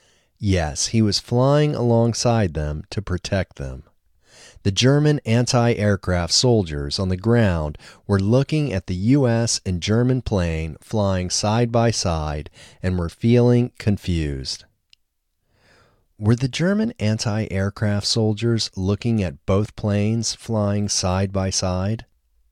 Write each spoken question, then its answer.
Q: Were the German anti-aircraft soldiers looking at both planes flying side by side?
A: Yes, the German anti-aircraft soldiers were looking at both planes flying side by side.